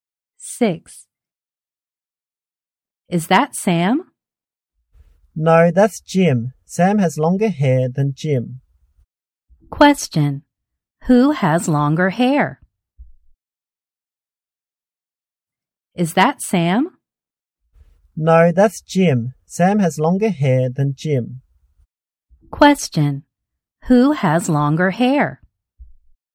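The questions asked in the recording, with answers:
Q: Who has longer hair?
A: Sam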